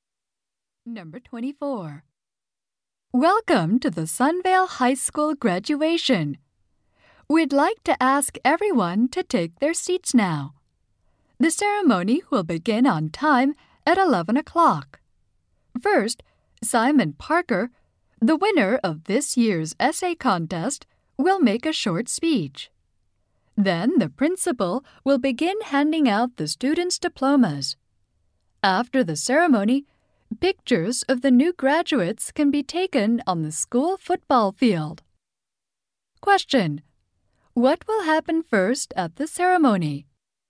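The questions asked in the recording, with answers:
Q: What will happen first at the ceremony?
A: Simon Parker will make a short speech.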